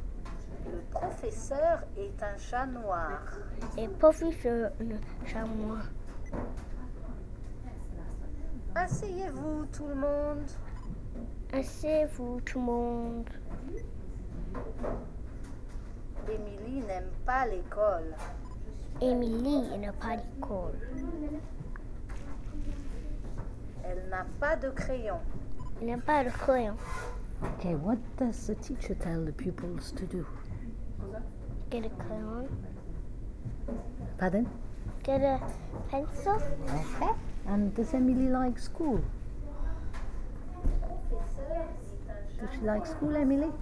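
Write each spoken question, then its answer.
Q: OK, what does the teacher tell the pupils to do?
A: Sit down

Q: And does Emily like school?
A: No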